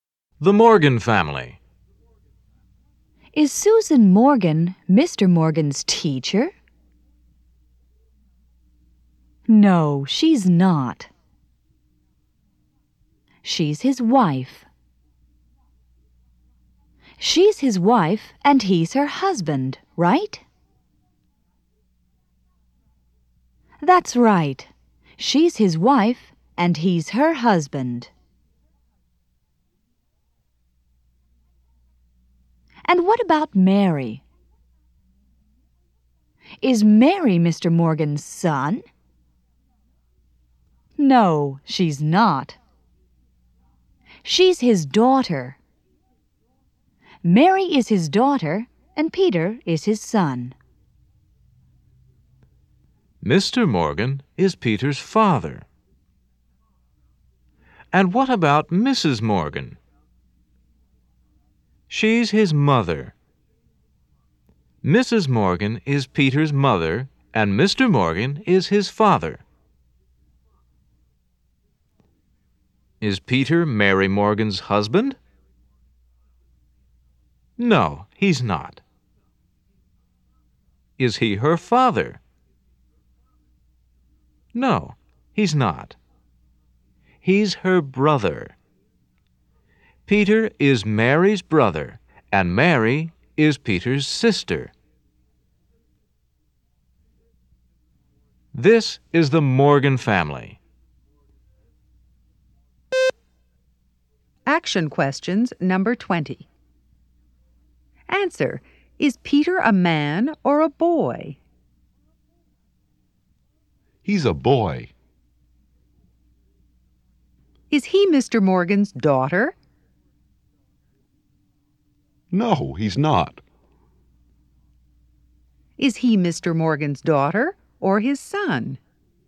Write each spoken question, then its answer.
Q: Is he Mr. Morgan's daughter or his son?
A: He's his son.